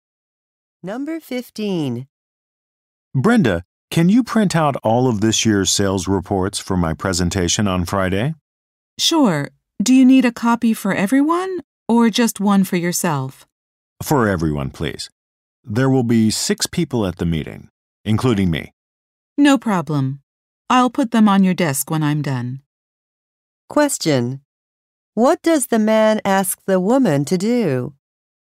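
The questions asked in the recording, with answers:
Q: What does the man ask the woman to do?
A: Print six copies of this year's sales reports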